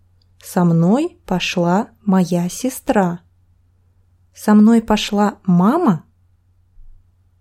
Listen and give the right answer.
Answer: Нет, не мама. Со мной пошла сестра.